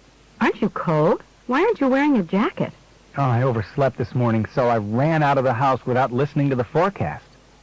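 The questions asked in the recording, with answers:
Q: What does the man mean?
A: He didn't know it would be cold because he didn't hear the forecast.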